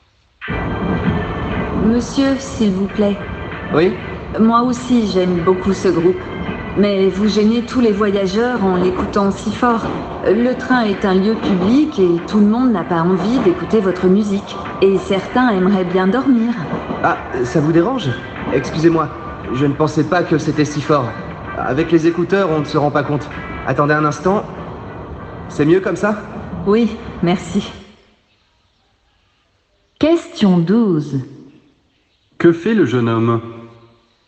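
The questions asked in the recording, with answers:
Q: Que fait le jeune homme ?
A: Il baisse le volume de sa musique.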